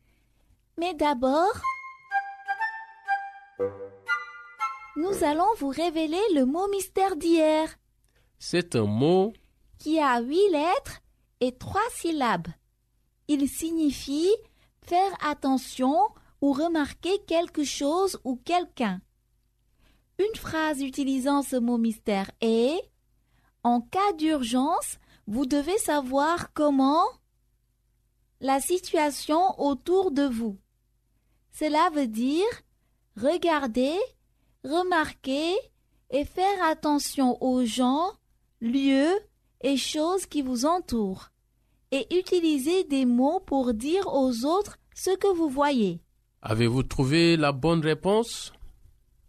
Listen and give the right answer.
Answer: Le mot mystère d'aujourd'hui est observer.